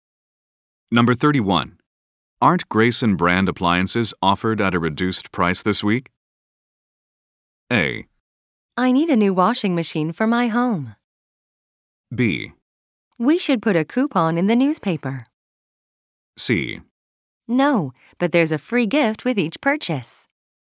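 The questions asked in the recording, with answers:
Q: Aren't Grayson brand appliances offered at a reduced price this week?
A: C: No, but there's a free gift with each purchase.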